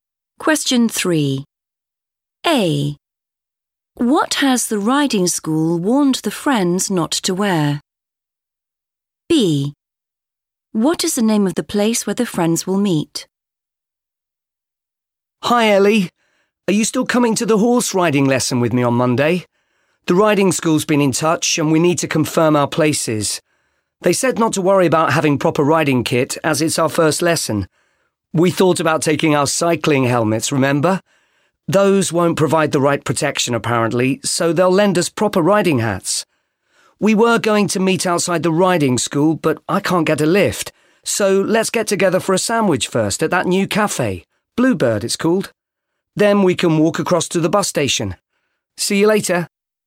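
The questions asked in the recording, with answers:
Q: What has the riding school warned the friends not to wear?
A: cycling helmets

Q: What is the name of the place where the friends will meet?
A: Bluebird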